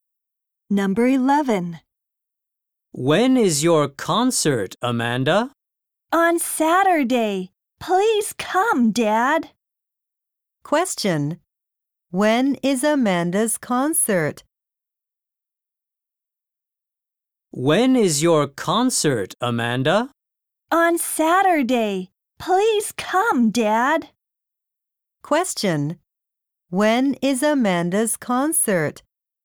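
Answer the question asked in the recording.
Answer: On Saturday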